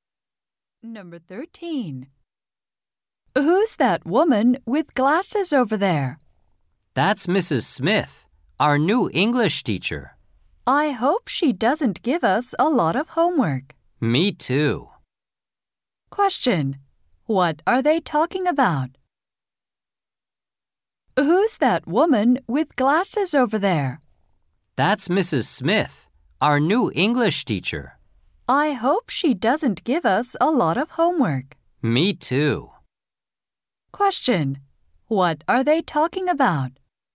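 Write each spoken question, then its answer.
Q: What are they talking about?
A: Their new English teacher.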